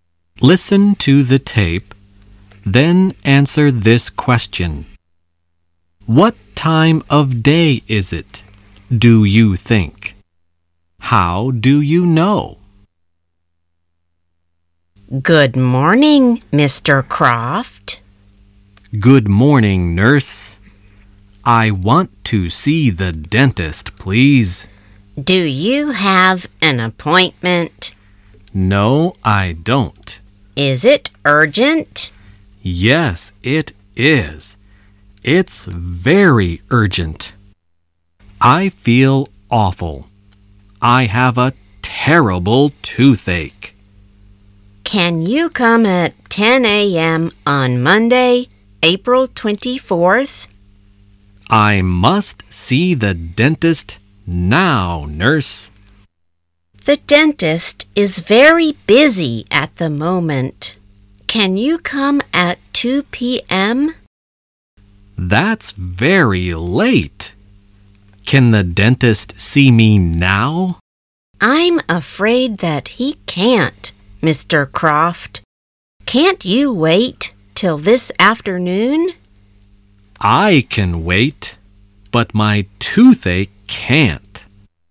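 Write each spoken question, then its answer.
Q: What time of day is it, do you think?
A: Morning (they say "Good morning")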